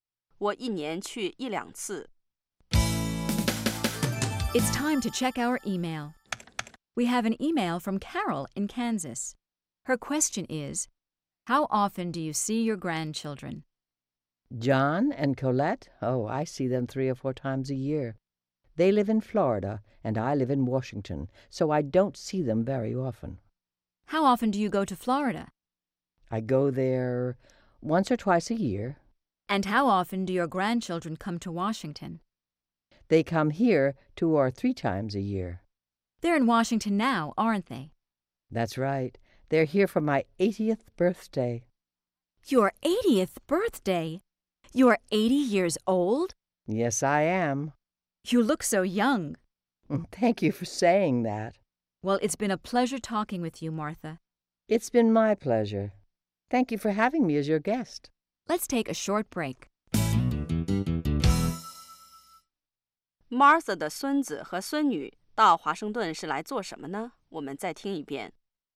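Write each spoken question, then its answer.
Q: Martha 的孙子和孙女到华盛顿是来做什么呢?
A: 来给她过八十岁生日。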